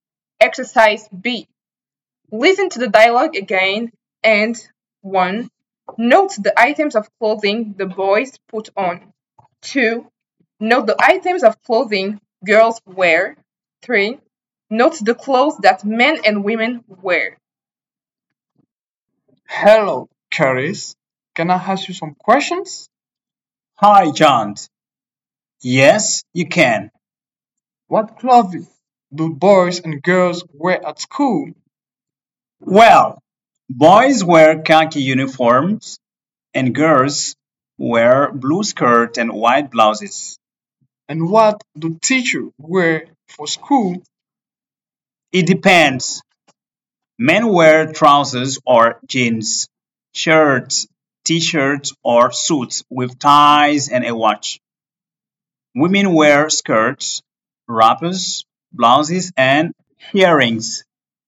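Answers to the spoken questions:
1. khaki uniforms
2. blue skirts and white blouses
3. Men: trousers or jeans, shirts, t-shirts or suits with ties and a watch; women: skirts, wrappers, blouses and earrings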